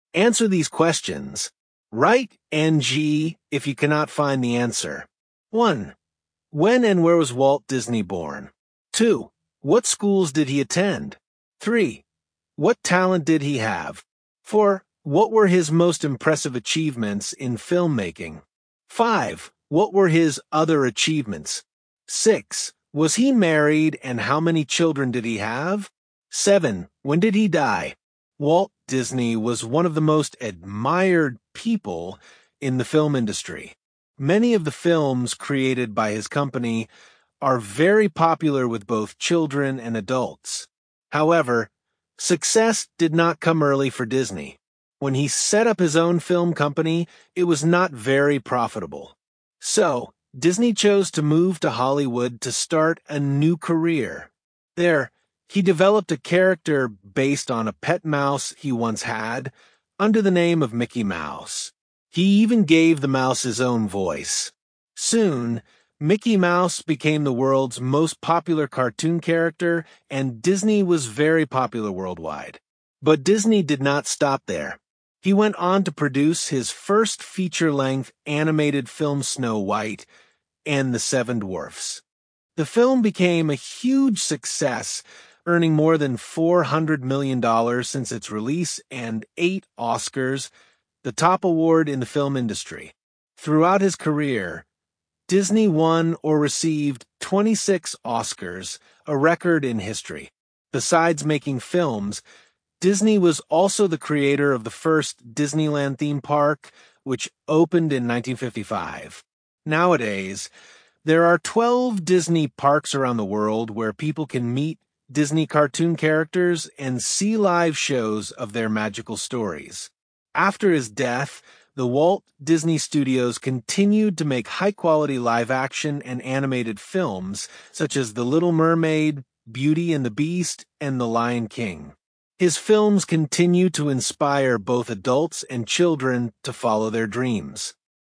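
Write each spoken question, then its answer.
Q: What were his most impressive achievements in filmmaking?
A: He created Mickey Mouse and made Snow White and the Seven Dwarfs; he won a record 26 Oscars

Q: What were his other achievements?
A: He created the first Disneyland theme park, opened in 1955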